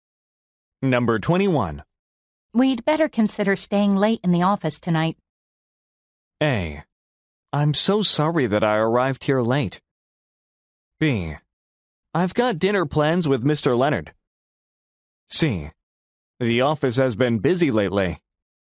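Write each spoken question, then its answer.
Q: We'd better consider staying late in the office tonight.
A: B: I've got dinner plans with Mr. Leonard.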